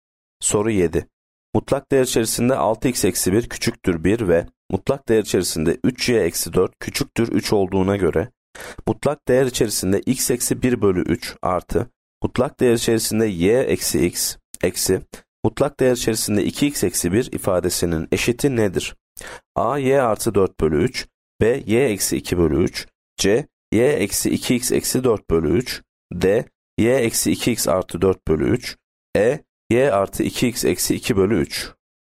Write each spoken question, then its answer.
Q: Mutlak değer içerisinde 6x eksi 1 küçüktür 1 ve mutlak değer içerisinde 3y eksi 4 küçüktür 3 olduğuna göre mutlak değer içerisinde x eksi 1 bölü 3 artı mutlak değer içerisinde y eksi x eksi mutlak değer içerisinde 2x eksi 1 ifadesinin eşiti nedir?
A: Yanıt B, y eksi 2 bölü 3.